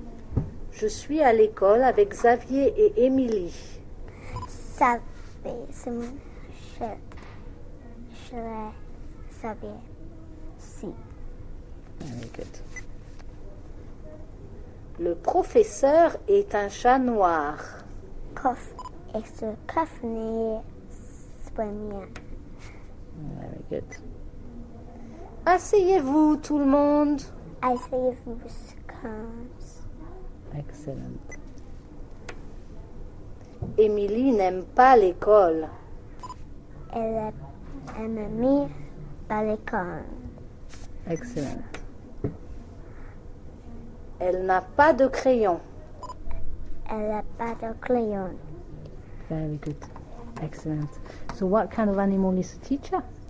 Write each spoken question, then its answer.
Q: So what kind of animal is the teacher?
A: A cat.